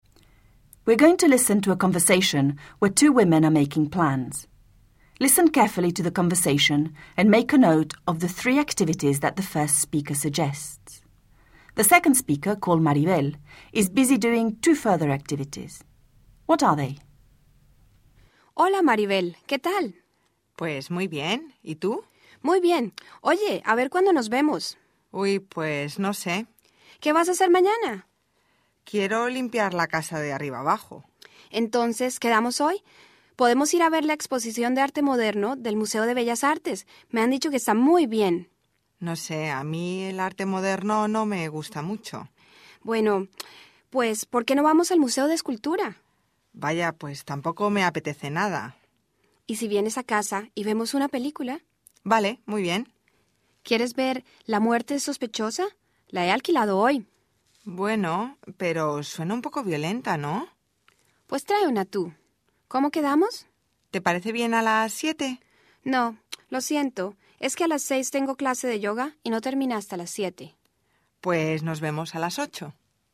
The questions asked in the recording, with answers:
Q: Listen carefully to the conversation and make a note of the three activities that the first speaker suggests.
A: The three activities that the first speaker suggested were going to the modern art exhibition, going to the sculpture museum, and watching a film.

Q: The second speaker, called Maribel, is busy doing two further activities. What are they?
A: Maribel is planning to clean the house from top to bottom and also has a yoga class.